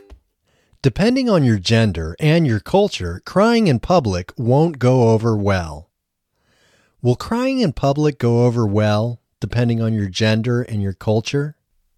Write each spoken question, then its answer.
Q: Will crying in public go over well, depending on your gender and your culture?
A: No, crying in public will not go over well, depending on your gender and your culture.